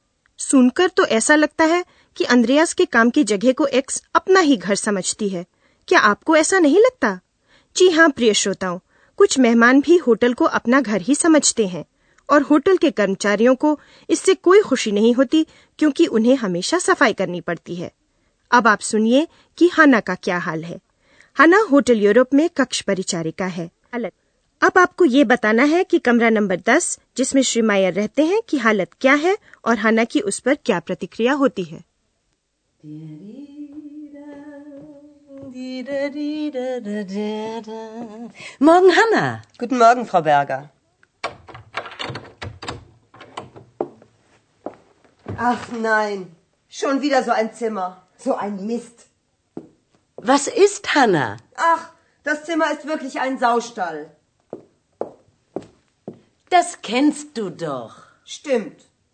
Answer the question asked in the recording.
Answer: हाना को कमरा सुअर खाने जैसा लगता है और इसलिए वह बहुत झुंझलाती है और बुड़बुड़ाने lagti hai.